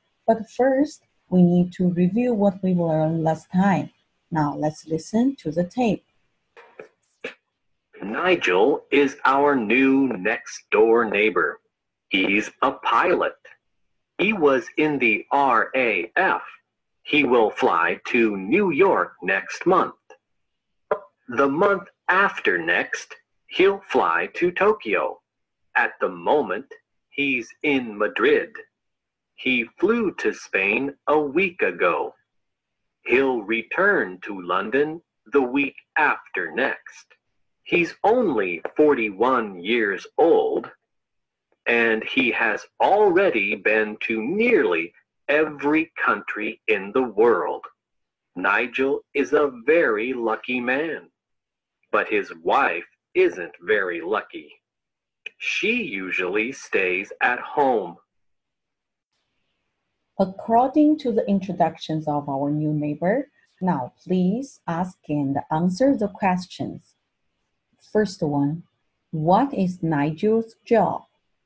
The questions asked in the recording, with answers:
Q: First one, what is Nigel's job?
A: He is a pilot.